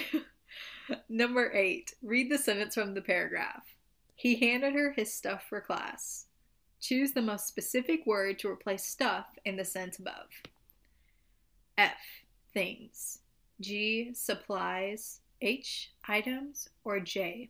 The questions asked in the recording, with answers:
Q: Choose the most specific word to replace stuff in the sentence above.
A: I want to say supplies.